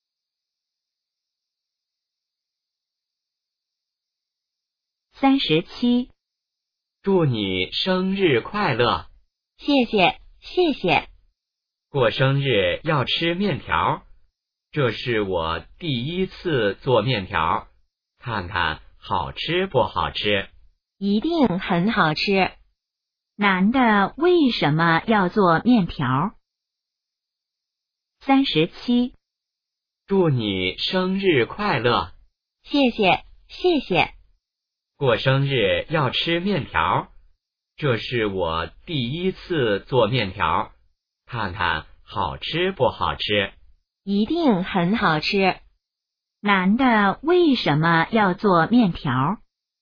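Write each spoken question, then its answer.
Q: 男的为什么要做面条?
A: 女的过生日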